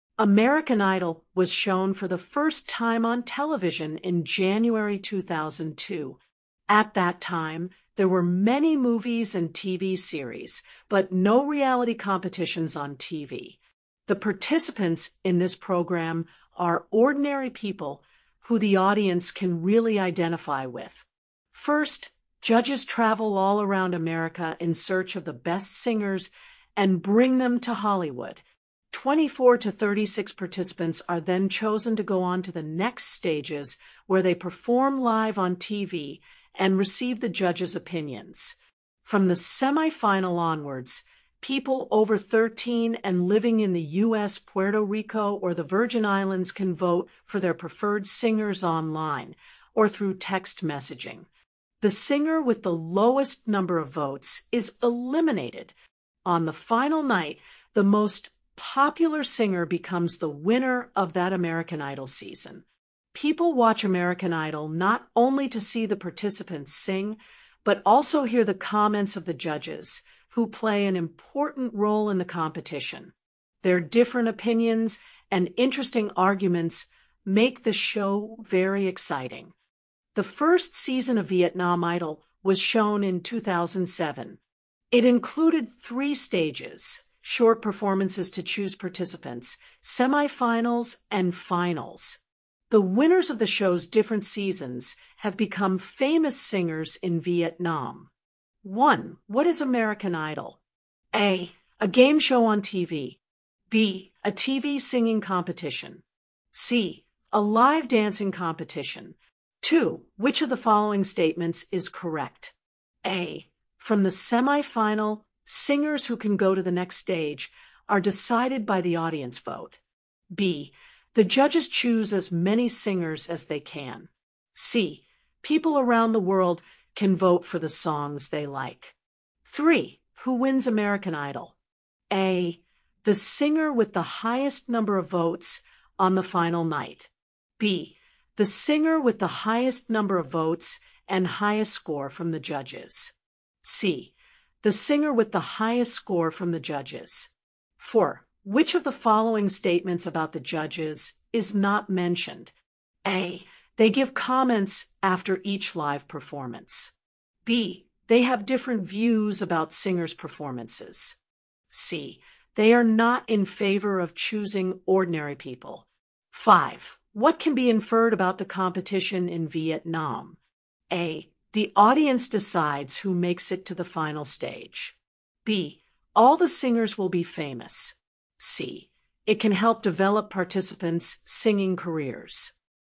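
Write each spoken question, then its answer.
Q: What is American Idol?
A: B: A TV singing competition.

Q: Which of the following statements is correct?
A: A: From the semifinal, singers who can go to the next stage are decided by the audience vote.

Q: Who wins American Idol?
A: A: The singer with the highest number of votes on the final night.

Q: Which of the following statements about the judges is not mentioned?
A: C: They are not in favor of choosing ordinary people.

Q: What can be inferred about the competition in Vietnam?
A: C: It can help develop participants' singing careers.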